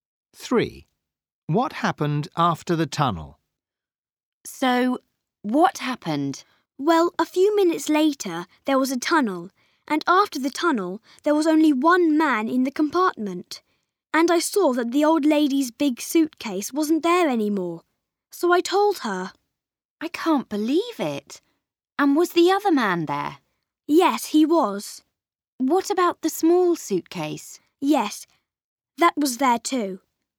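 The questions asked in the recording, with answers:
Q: What happened after the tunnel?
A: Only one man was left and the old lady's big suitcase was gone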